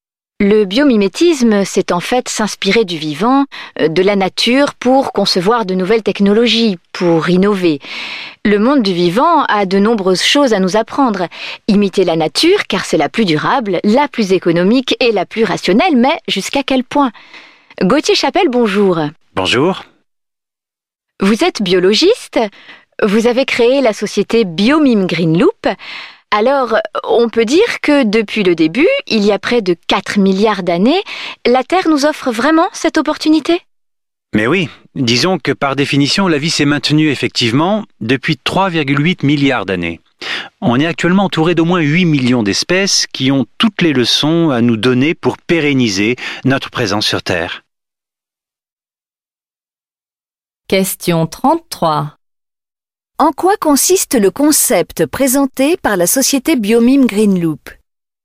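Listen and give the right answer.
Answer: S'inspirer du vivant, de la nature, pour concevoir de nouvelles technologies et innover (biomimétisme).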